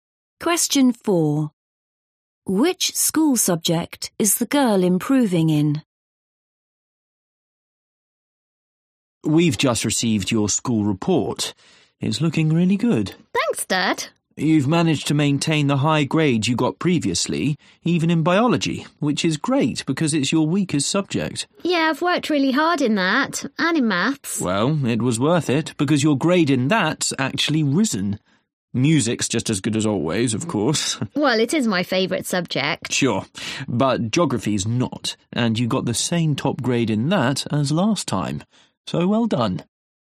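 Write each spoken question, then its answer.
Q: Which school subject is the girl improving in?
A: Maths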